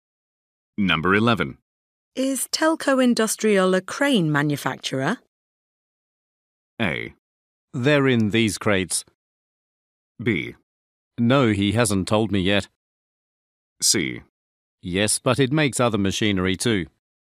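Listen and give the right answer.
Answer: C: Yes, but it makes other machinery too.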